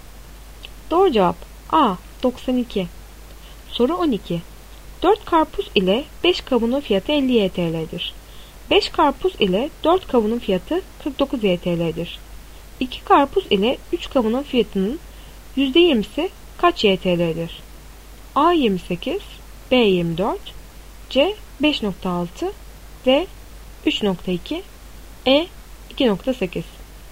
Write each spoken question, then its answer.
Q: 2 karpuz ile 3 kavunun fiyatının %20'si kaç YTL'dir?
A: Doğru cevap C5.6.